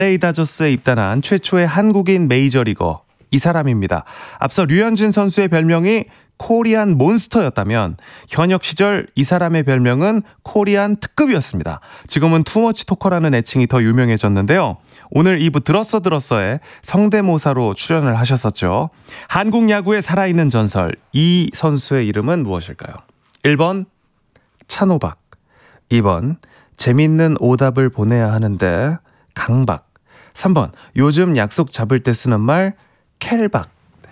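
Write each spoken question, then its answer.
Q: 한국 야구의 살아있는 전설 이 선수의 이름은 무엇일까요?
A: 1: 찬호박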